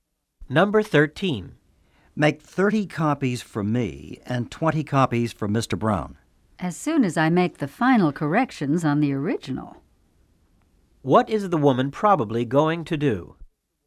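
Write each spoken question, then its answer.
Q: What is the woman probably going to do?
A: Make the final corrections on the original before copying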